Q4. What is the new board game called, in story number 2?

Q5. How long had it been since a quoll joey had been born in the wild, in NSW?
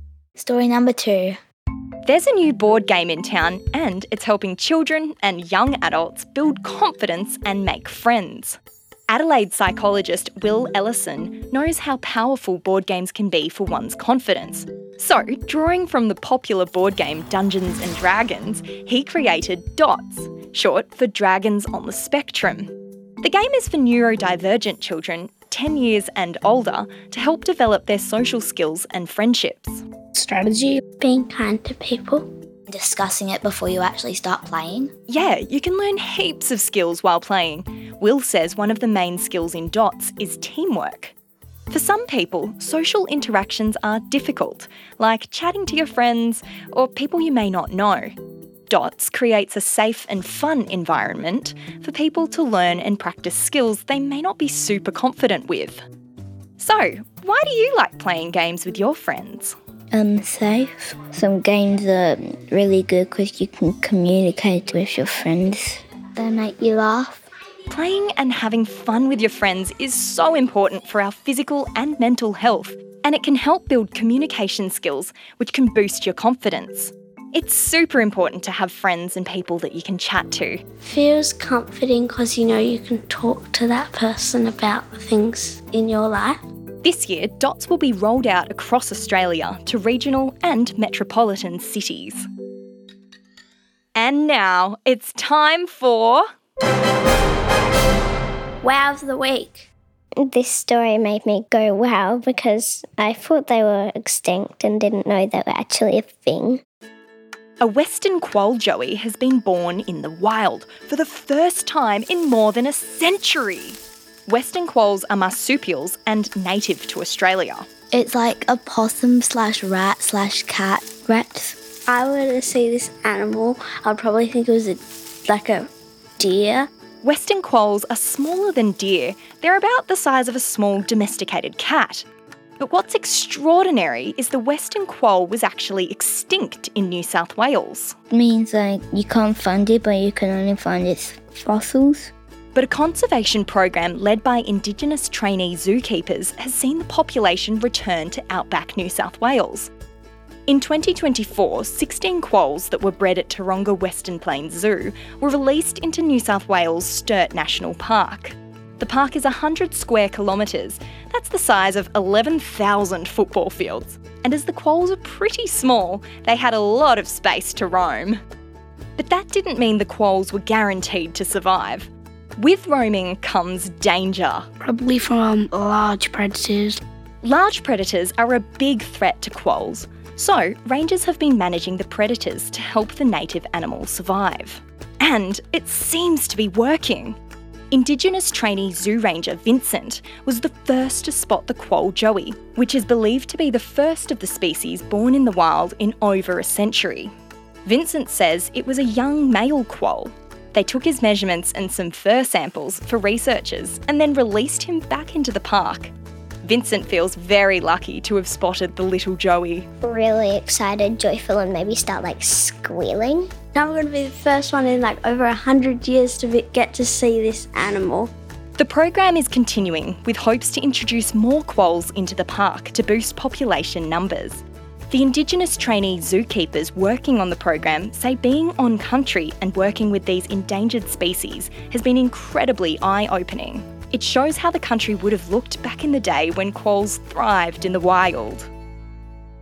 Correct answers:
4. DOTS or Dragons of the Spectrum
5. A century!